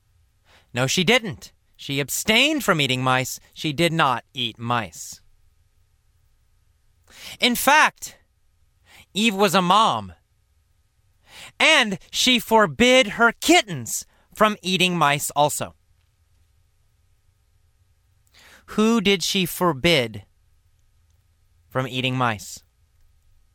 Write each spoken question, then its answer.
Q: Who did she forbid from eating mice?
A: Her kittens, her little baby cats.